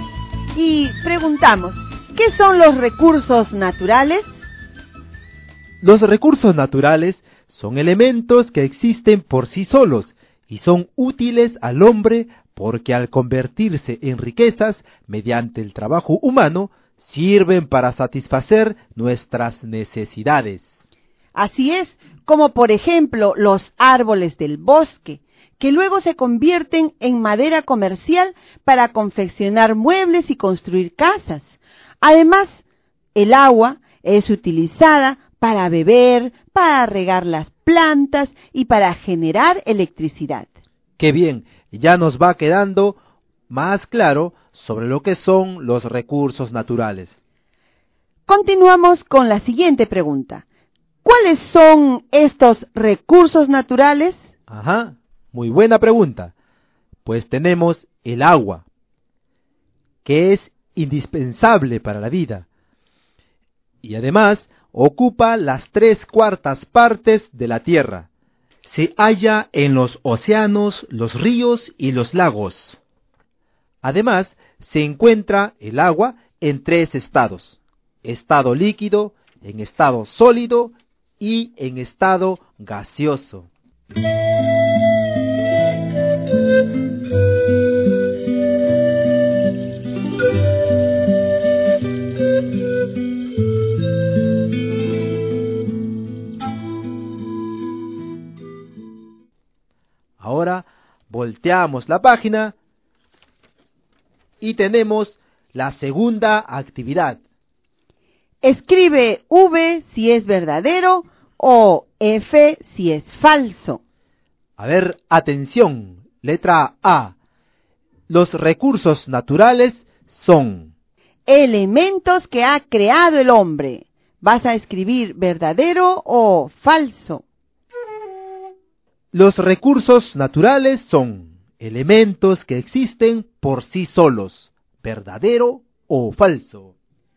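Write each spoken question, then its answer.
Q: Los recursos naturales son... elementos que ha creado el hombre. ¿Vas a escribir verdadero o falso?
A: Falso

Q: Los recursos naturales son elementos que existen por sí solos, verdadero o falso.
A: Verdadero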